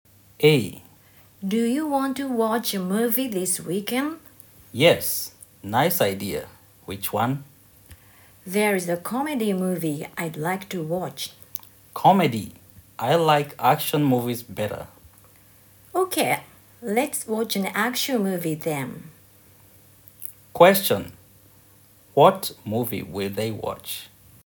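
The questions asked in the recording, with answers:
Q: What movie will they watch?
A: An action movie.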